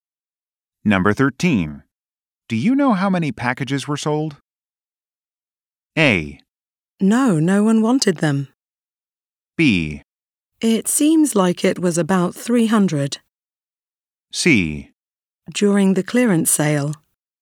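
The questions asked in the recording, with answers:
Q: Do you know how many packages were sold?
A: B: It seems like it was about 300.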